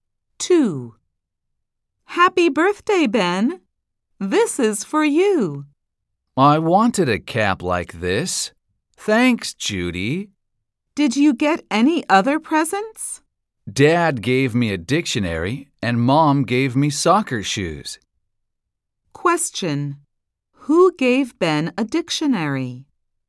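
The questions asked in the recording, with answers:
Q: Who gave Ben a dictionary?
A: his dad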